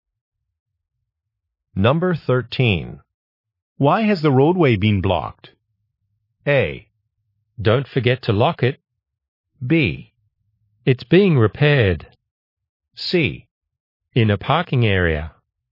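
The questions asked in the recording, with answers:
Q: Why has the roadway been blocked?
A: B: It's being repaired.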